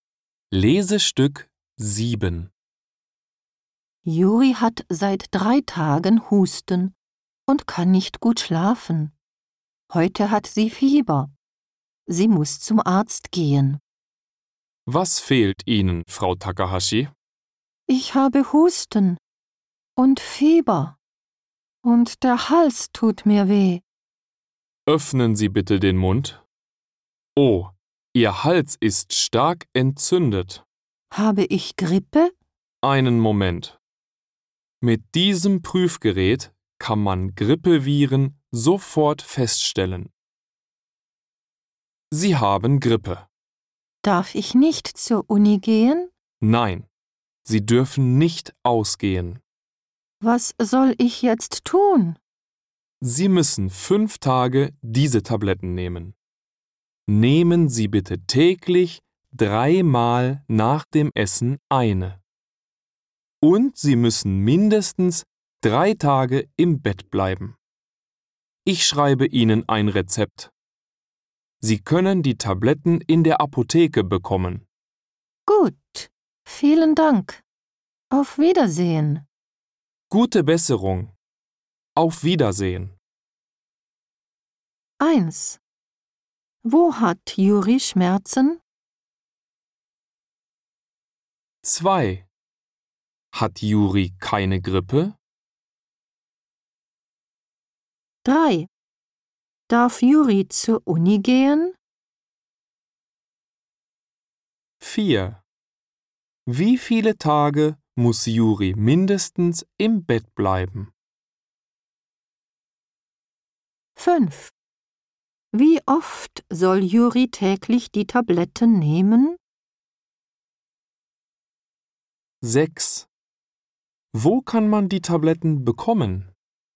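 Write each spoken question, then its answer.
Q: Wo hat Juri Schmerzen?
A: Im Hals

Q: Hat Juri keine Grippe?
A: Doch, sie hat Grippe.

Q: Darf Juri zur Uni gehen?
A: Nein, sie darf nicht zur Uni gehen.

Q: Wie viele Tage muss Juri mindestens im Bett bleiben?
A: Mindestens 3 Tage

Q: Wie oft soll Juri täglich die Tabletten nehmen?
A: 3-mal täglich nach dem Essen

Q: Wo kann man die Tabletten bekommen?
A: In der Apotheke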